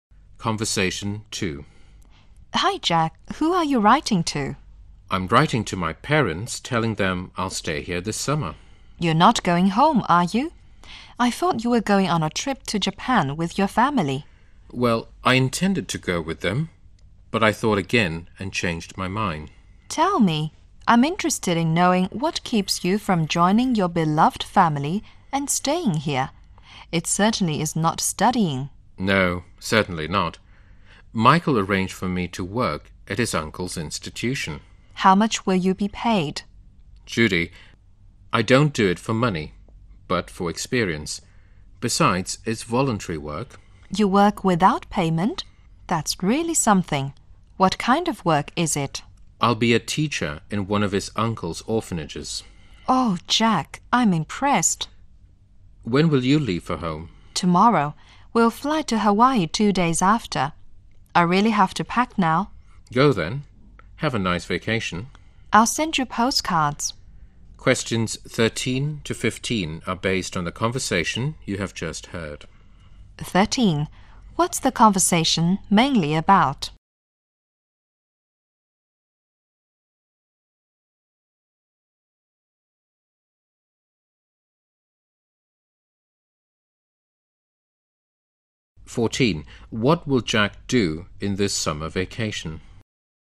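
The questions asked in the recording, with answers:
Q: What will Jack do in this summer vacation?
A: Do voluntary work as a teacher in an orphanage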